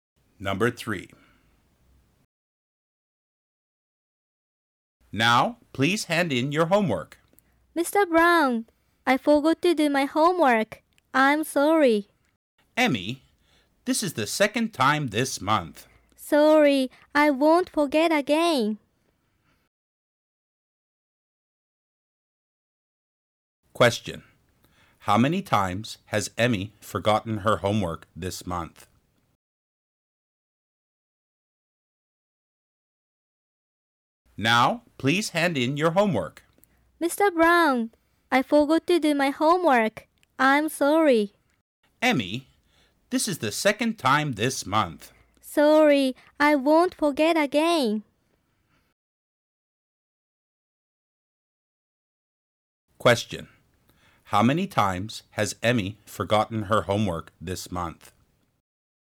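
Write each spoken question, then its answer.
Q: Question. How many times has Emmy forgotten her homework this month?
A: Twice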